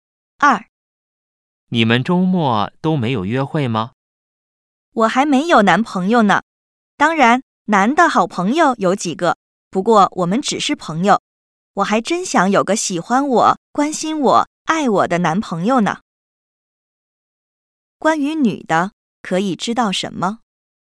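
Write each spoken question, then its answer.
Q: 关于女的,可以知道什么?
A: 她还没有男朋友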